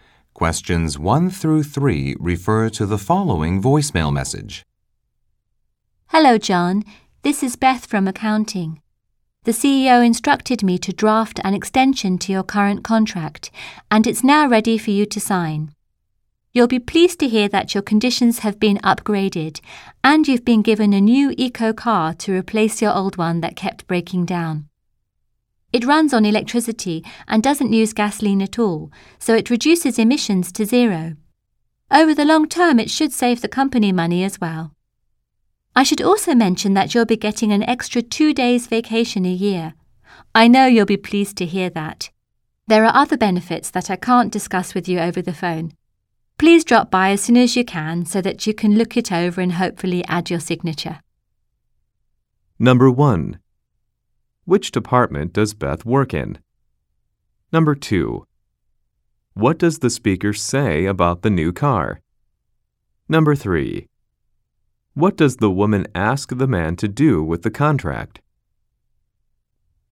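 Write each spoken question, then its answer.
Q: Which department does Beth work in?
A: Accounting

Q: What does the speaker say about the new car?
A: It runs on electricity and produces zero emissions

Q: What does the woman ask the man to do with the contract?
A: Come by to look it over and sign it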